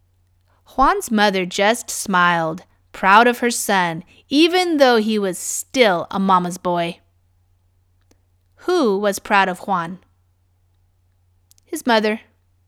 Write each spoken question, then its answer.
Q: Who was proud of Juan?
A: His mother.